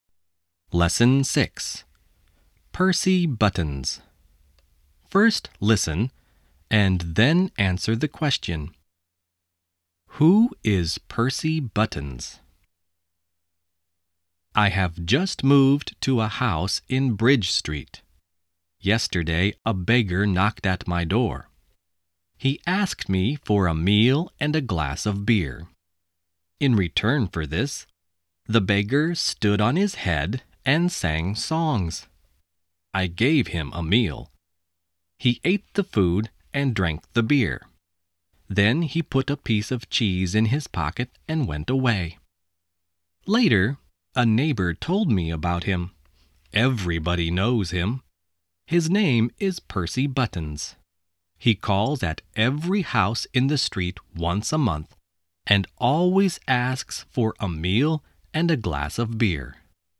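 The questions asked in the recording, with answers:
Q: Who is Percy Buttons?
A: A beggar who calls at every house in the street once a month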